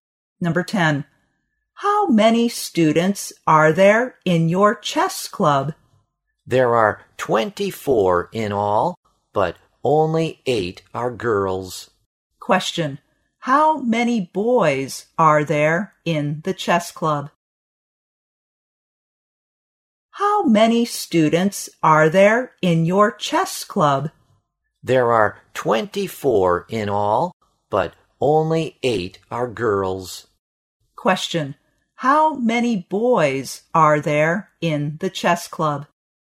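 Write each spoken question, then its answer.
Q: How many boys are there in the chess club?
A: 16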